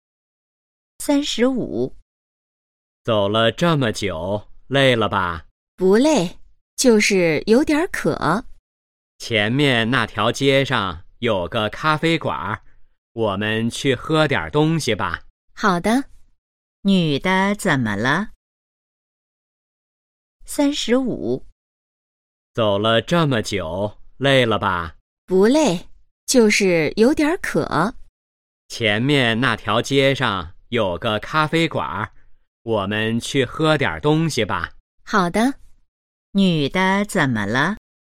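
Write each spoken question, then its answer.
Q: 女的怎么了?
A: 有点渴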